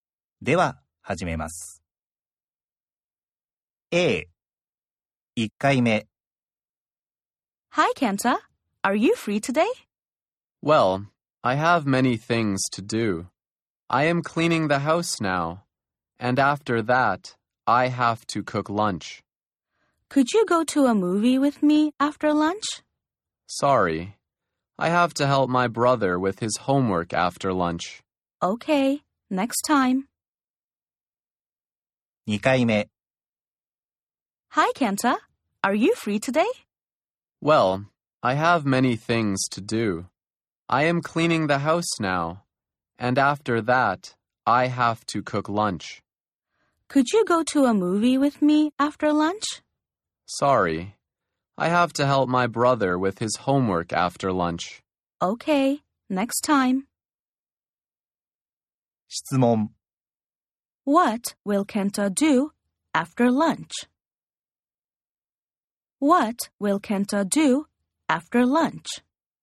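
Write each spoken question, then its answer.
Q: What will Kenta do after lunch?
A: He will help his brother with his homework.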